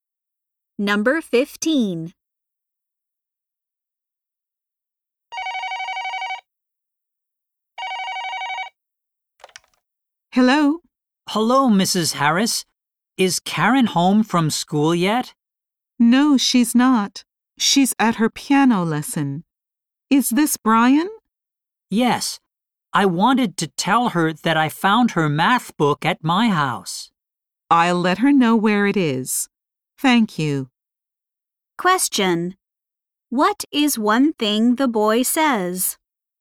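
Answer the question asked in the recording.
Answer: He found Karen's math book at his house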